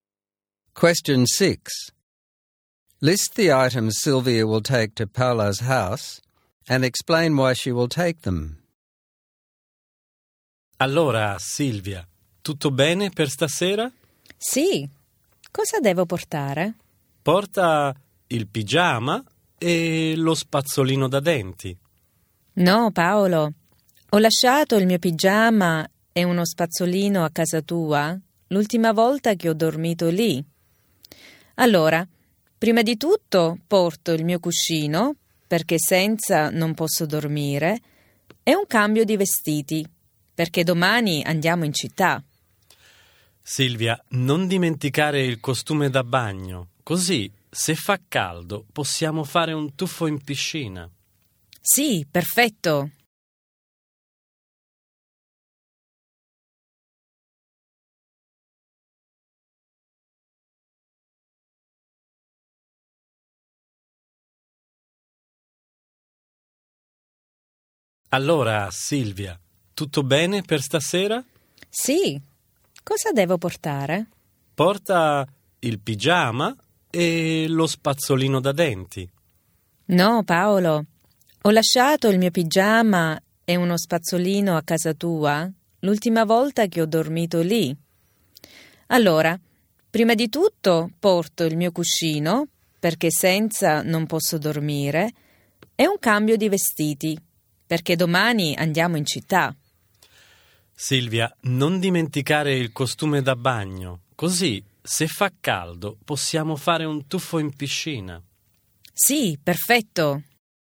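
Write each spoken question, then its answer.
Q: List the items Sylvia will take to Paola's house and explain why she will take them.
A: Her pillow, because she can't sleep without it; a change of clothes, because they are going into town tomorrow; her swimsuit, so they can swim in the pool if it's hot.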